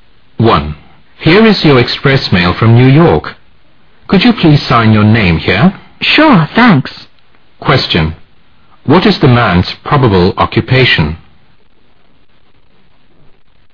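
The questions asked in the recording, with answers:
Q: What is the man's probable occupation?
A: A mail carrier / courier delivering express mail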